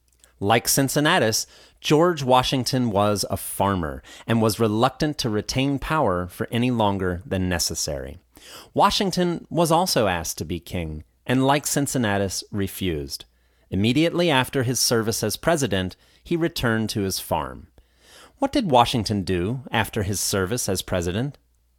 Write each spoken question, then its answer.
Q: What did Washington do after his service as president?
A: Like Cincinnatus, he returned to his farm.